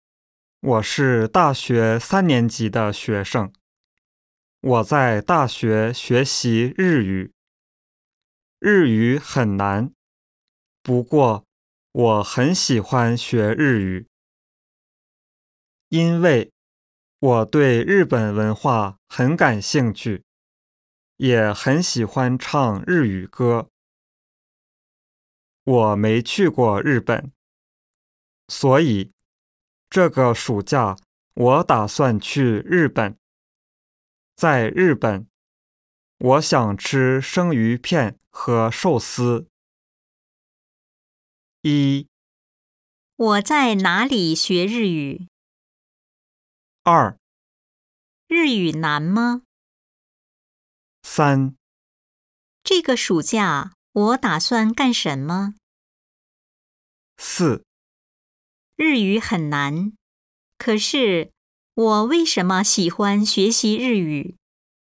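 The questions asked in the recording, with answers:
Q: 我在哪里学日语?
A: 在大学

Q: 日语难吗?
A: 很难

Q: 这个暑假我打算干什么?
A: 去日本

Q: 日语很难,可是我为什么喜欢学习日语?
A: 因为对日本文化很感兴趣,也很喜欢唱日语歌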